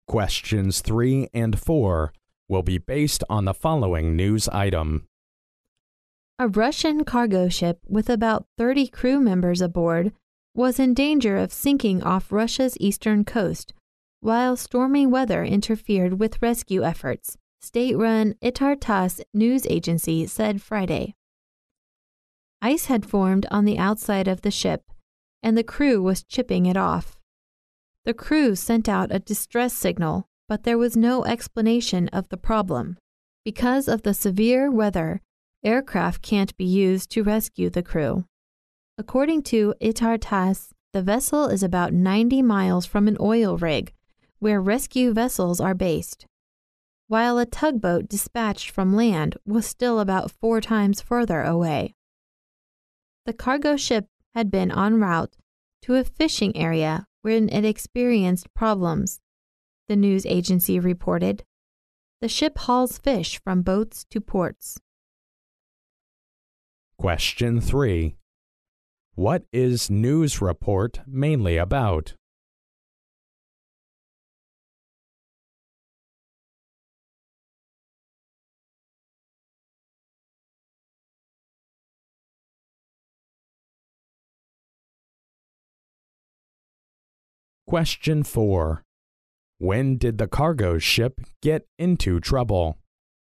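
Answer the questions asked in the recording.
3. A Russian cargo ship in danger of sinking off Russia's eastern coast in stormy weather
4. While it was on its way to a fishing area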